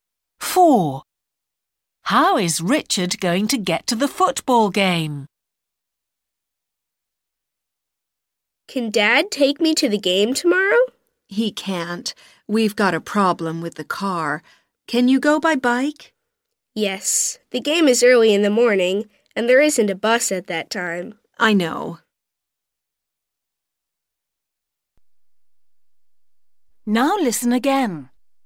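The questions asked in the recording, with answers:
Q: How is Richard going to get to the football game?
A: by bike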